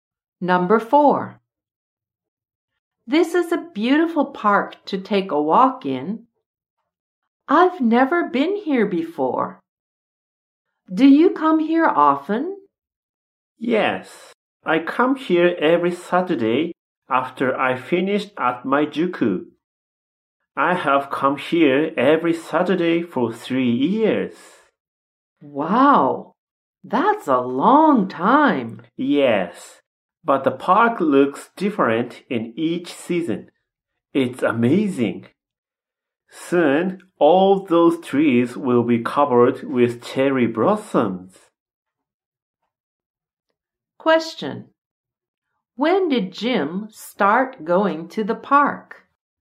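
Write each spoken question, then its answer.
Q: When did Jim start going to the park?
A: Three years ago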